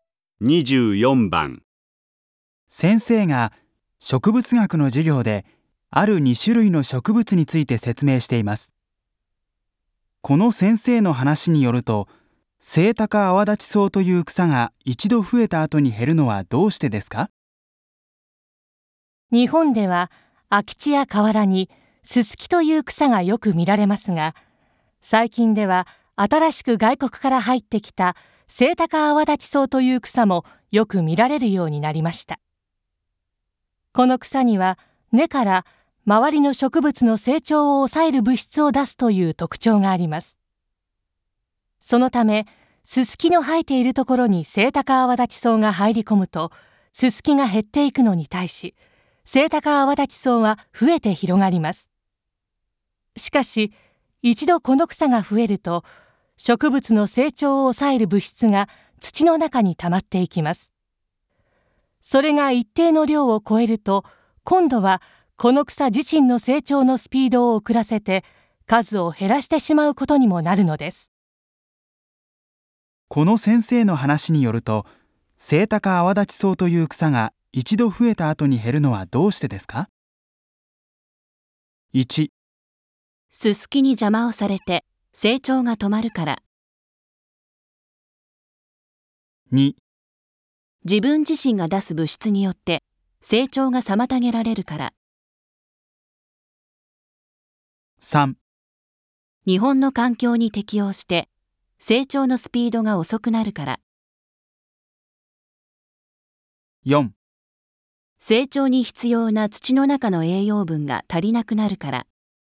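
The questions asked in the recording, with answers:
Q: この先生の話によると、セイタカアワダチソウという草が一度増えた後に減るのはどうしてですか?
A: 2: 自分自身が出す物質によって成長が妨げられるから。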